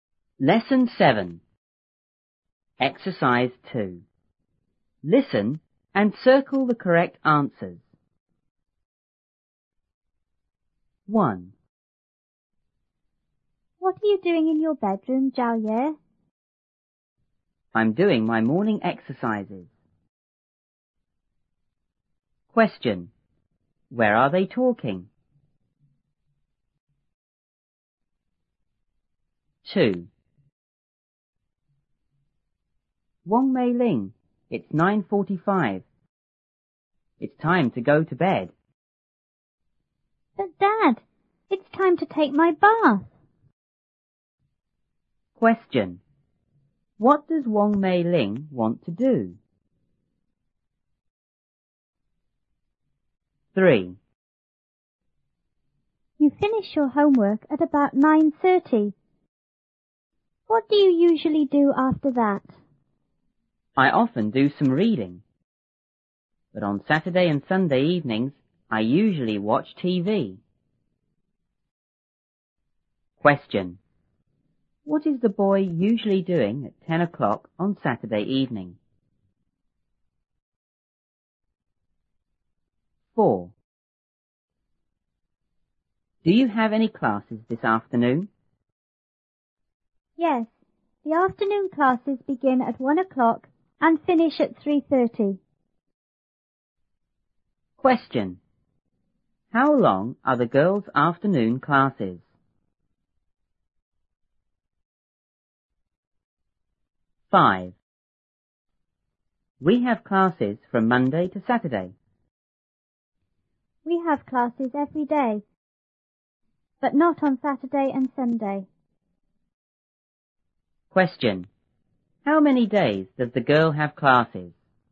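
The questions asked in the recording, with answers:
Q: Where are they talking?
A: In the bedroom

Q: What does Wong Mei Ling want to do?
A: Take her bath

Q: What is the boy usually doing at 10 o'clock on Saturday evening?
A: Watching TV

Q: How long are the girls' afternoon classes?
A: Two and a half hours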